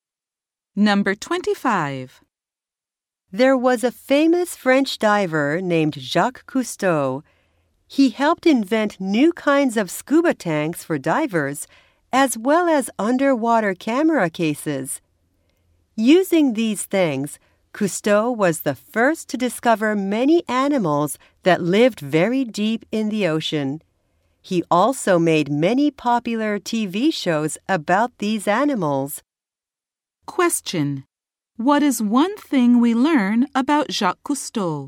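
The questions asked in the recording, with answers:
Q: What is one thing we learn about Jacques Cousteau?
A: He helped invent new scuba tanks and underwater camera cases.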